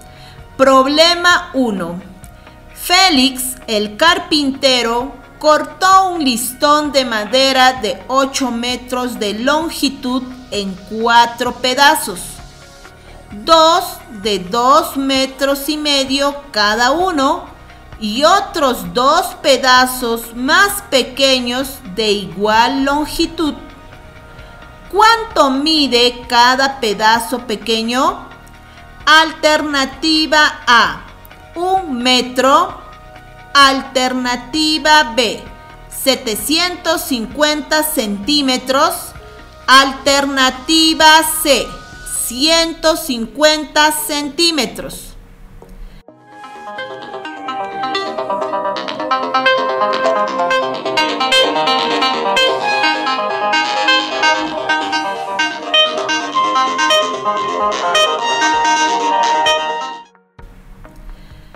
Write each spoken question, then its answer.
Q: ¿Cuánto mide cada pedazo pequeño?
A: Respuesta correcta. ¡Sí!